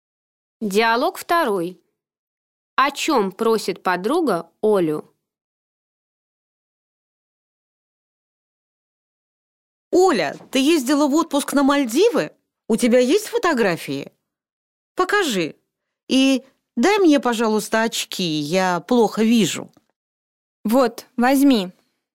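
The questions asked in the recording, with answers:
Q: О чем просит подруга Олю?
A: Показать фотографии с Мальдив и дать очки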